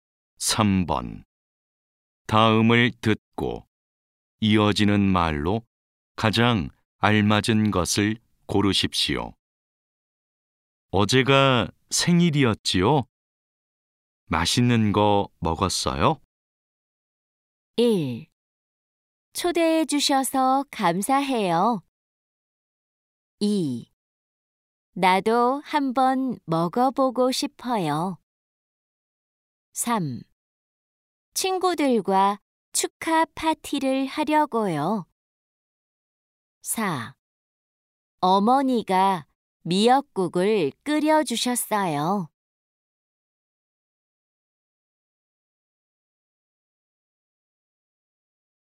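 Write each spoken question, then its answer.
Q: 어제가 생일이었지요? 맛있는 거 먹었어요?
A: 4: 어머니가 미역국을 끓여주셨어요.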